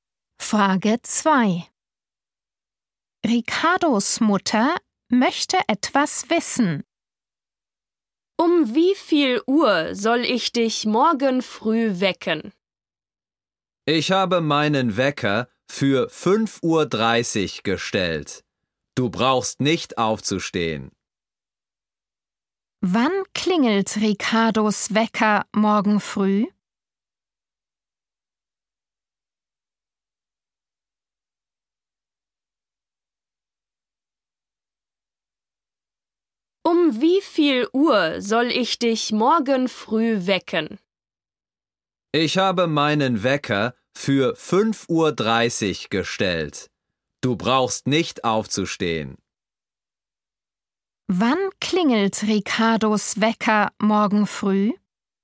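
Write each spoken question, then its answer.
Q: Wann klingelt Ricardos Wecker morgen früh?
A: um 5.30 Uhr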